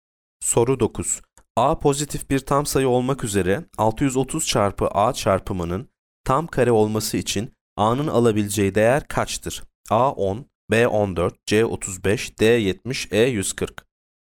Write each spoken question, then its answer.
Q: A pozitif bir tam sayı olmak üzere 630 çarpı A çarpımının tam kare olması için A'nın alabileceği değer kaçtır?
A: Yanıt D 70.